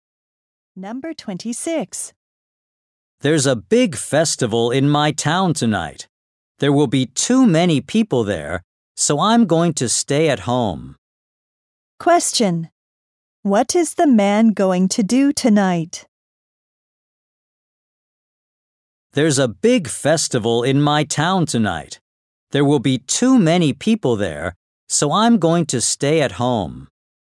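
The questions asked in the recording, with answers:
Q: Question. What is the man going to do tonight?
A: Stay at home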